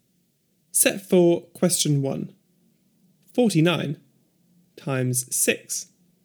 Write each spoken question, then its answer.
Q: 49 times 6.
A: 294.